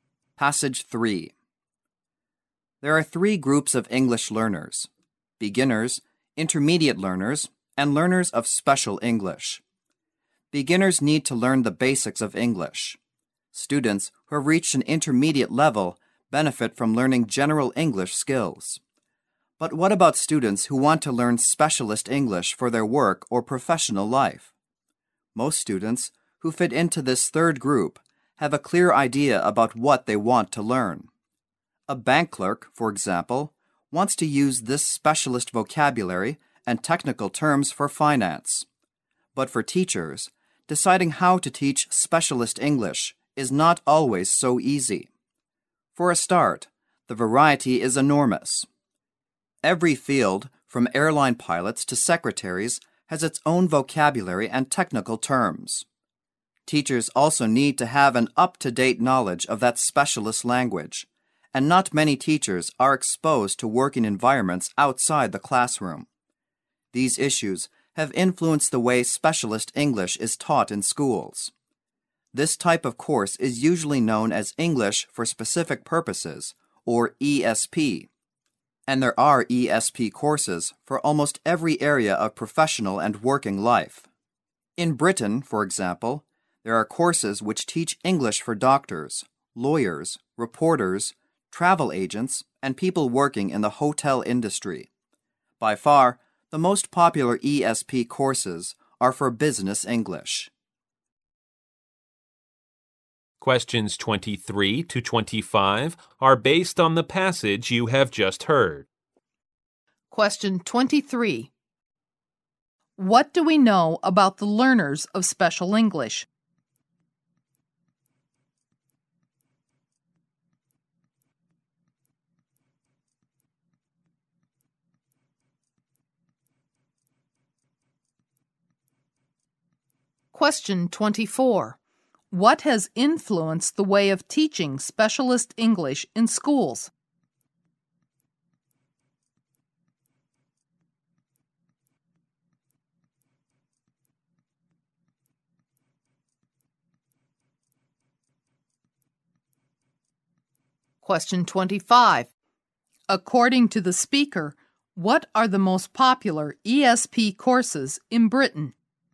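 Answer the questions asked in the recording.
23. They have a clear idea of what they want to learn.
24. The huge variety of specialist fields and teachers' lack of up-to-date specialist knowledge.
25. Business English courses.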